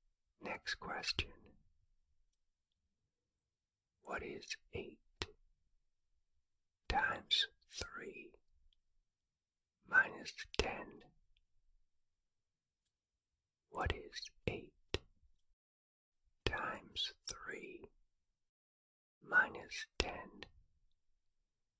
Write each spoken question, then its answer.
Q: What is 8 times 3 minus 10?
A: The answer is 14.